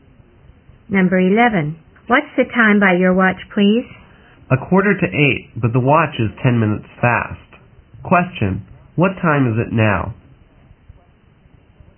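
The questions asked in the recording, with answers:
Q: What time is it now?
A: 7:35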